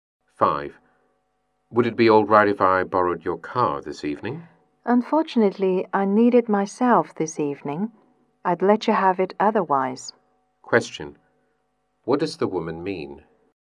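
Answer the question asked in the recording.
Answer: She can't lend him her car because she needs it herself.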